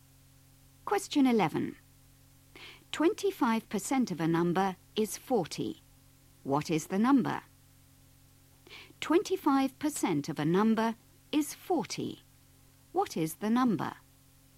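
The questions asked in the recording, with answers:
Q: What is the number?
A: 160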